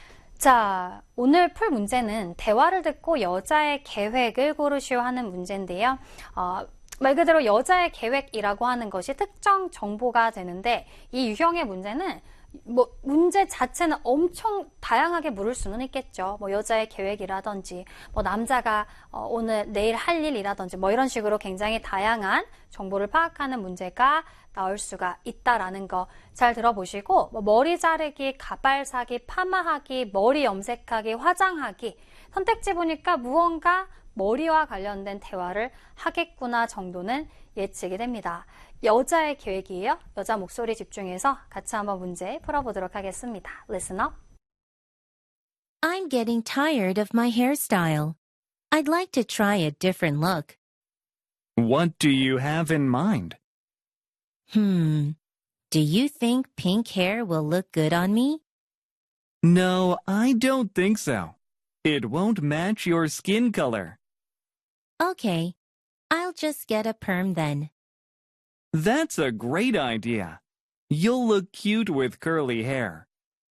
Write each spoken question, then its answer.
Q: 대화를 듣고 여자의 계획을 고르시오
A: 정답은 여자의 계획은 파마하기 3번이 되겠네요.